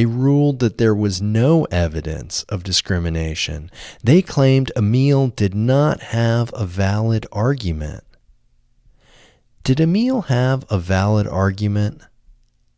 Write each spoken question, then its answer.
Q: Did Emile have a valid argument?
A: No, Emile didn't have a valid argument.